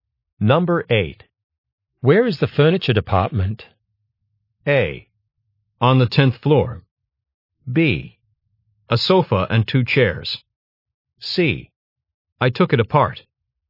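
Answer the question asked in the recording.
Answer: A: On the 10th floor.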